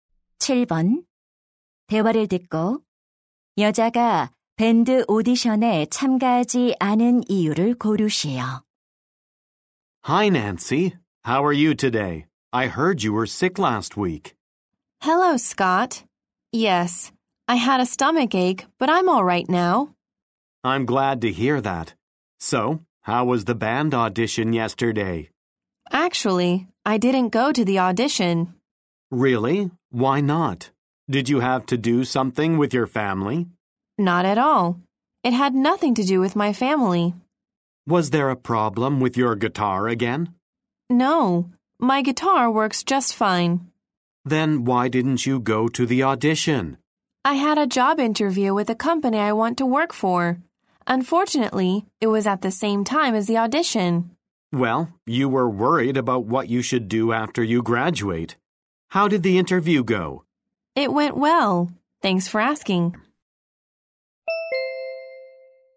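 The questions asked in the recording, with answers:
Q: 대화를 듣고 여자가 밴드 오디션에 참가하지 않은 이유를 고르시오.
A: 취업 면접이 오디션과 같은 시간에 있어서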